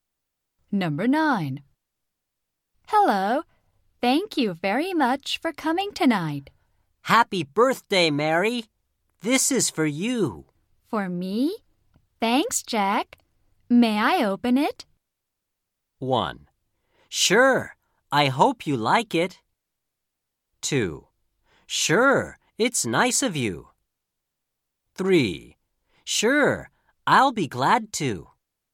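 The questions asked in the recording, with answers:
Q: For me? Thanks, Jack. May I open it?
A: 1: Sure. I hope you like it.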